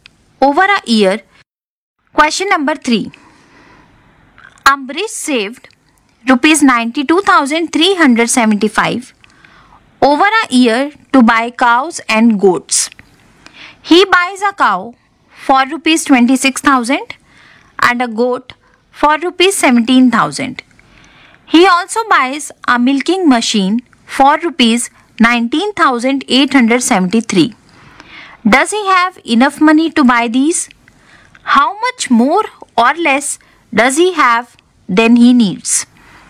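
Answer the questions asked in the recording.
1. Yes
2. Rupees 29,502 more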